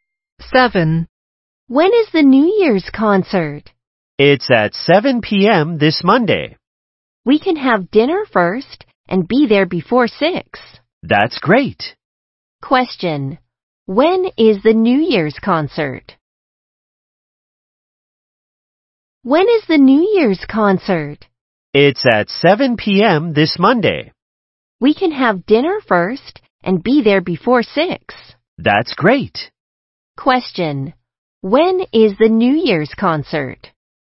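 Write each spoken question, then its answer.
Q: When is the New Year's concert?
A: At 7 p.m. this Monday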